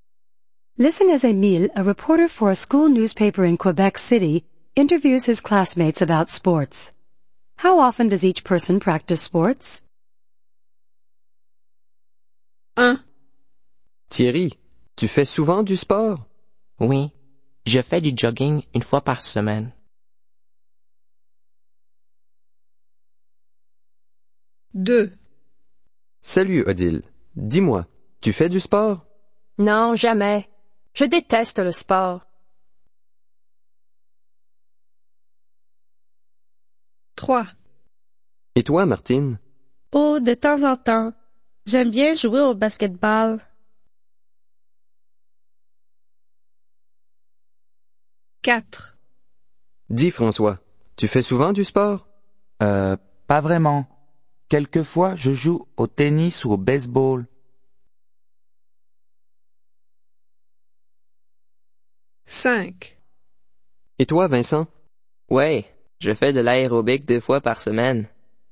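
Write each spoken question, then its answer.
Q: Thierry, tu fais souvent du sport?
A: Once a week (jogging)

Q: Salut Odile, dis-moi, tu fais du sport?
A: Never

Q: Et toi, Martine?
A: From time to time (basketball)

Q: Dis, François, tu fais souvent du sport?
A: Sometimes (tennis or baseball)

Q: Et toi, Vincent?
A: Twice a week (aerobics)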